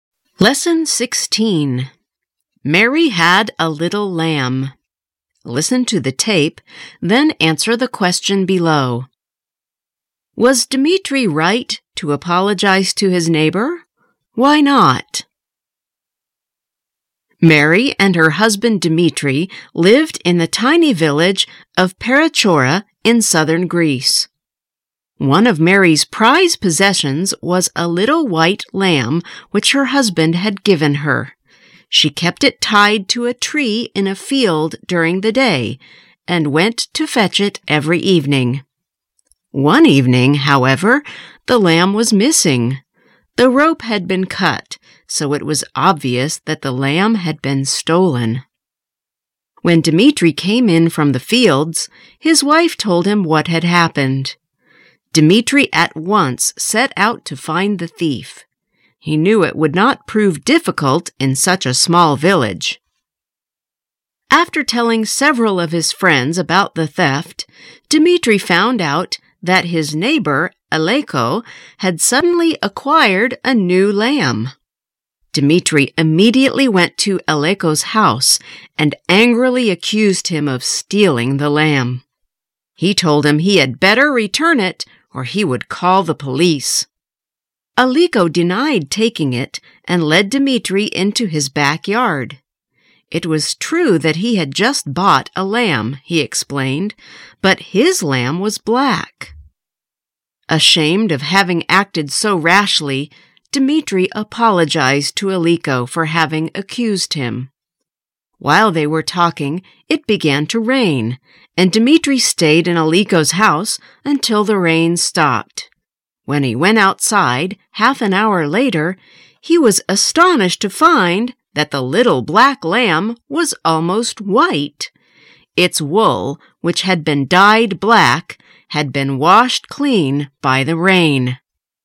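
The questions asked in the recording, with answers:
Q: Was Dmitri right to apologize to his neighbor?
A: No, because Aleko had stolen the lamb and dyed it black; the rain washed the dye off and showed it was white.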